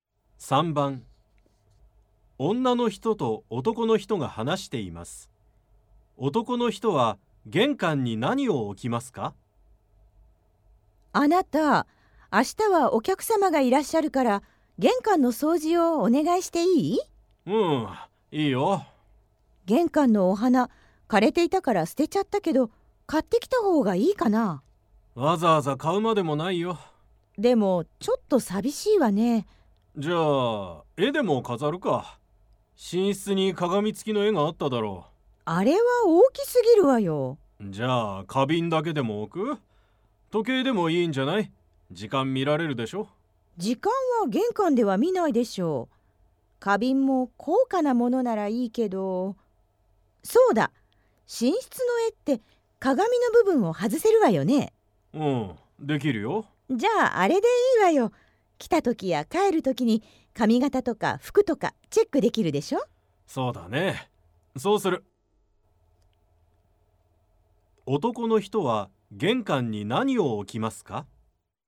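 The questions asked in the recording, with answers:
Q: 男の人は玄関に何を置きますか?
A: 鏡(寝室の絵から外した鏡)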